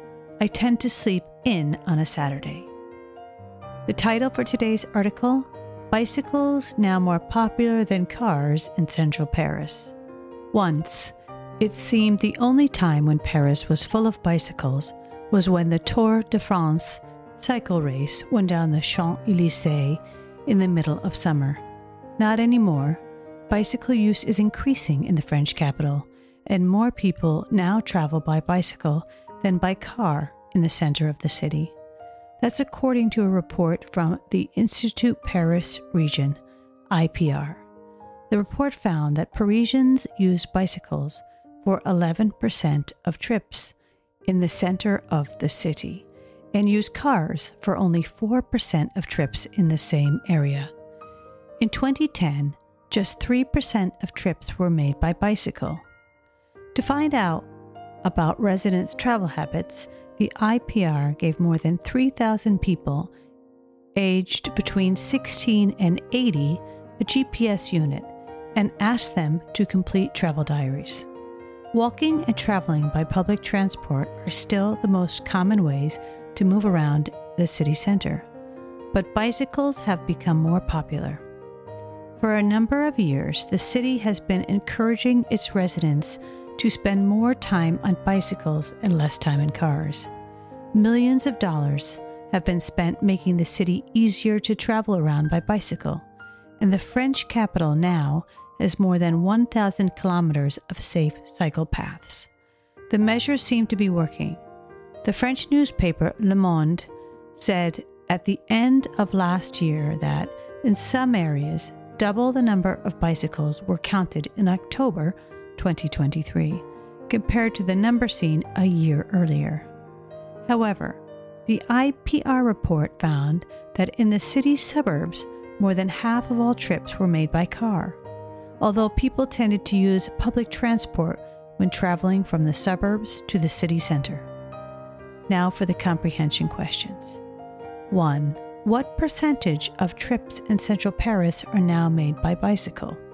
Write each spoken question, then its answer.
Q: What percentage of trips in central Paris are now made by bicycle?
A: 11%.